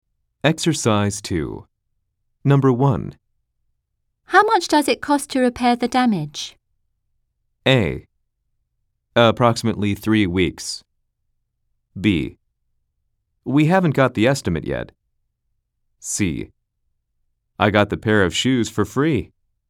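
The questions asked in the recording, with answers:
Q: How much does it cost to repair the damage?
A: B: We haven't got the estimate yet.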